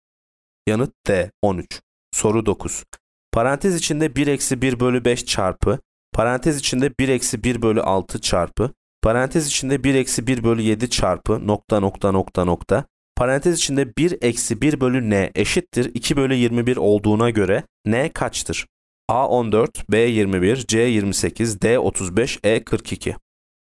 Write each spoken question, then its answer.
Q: Parantez içinde 1 eksi 1 bölü 5 çarpı, parantez içinde 1 eksi 1 bölü 6 çarpı, parantez içinde 1 eksi 1 bölü 7 çarpı, nokta nokta nokta nokta, parantez içinde 1 eksi 1 bölü n eşittir 2 bölü 21 olduğuna göre n kaçtır?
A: Yanıt E 42.